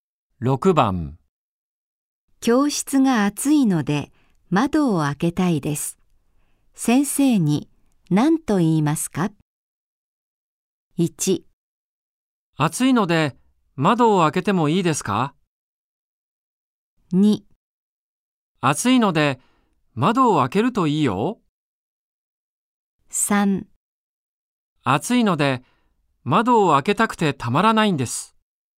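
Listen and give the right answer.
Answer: 1: 暑いので窓を開けてもいいですか?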